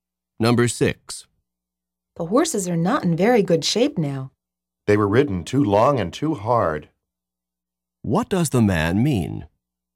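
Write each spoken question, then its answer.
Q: What does the man mean?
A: Someone rode the horses too long and too hard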